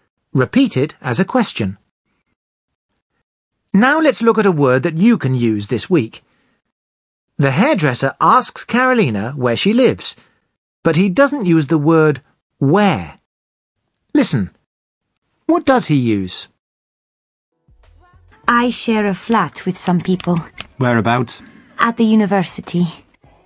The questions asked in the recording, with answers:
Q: Listen, what does he use?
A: He says, whereabouts.